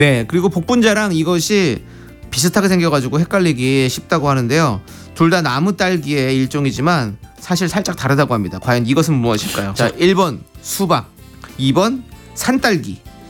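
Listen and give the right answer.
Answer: 2번: 산딸기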